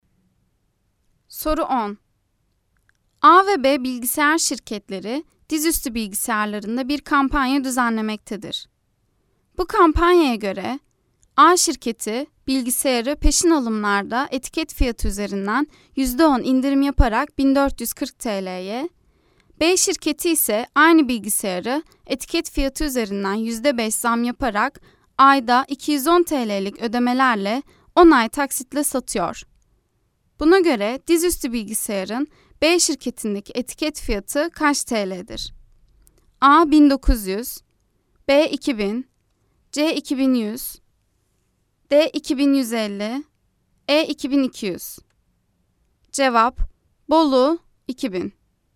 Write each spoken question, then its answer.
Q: Buna göre dizüstü bilgisayarın B şirketindeki etiket fiyatı kaç TL'dir?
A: Bolu 2000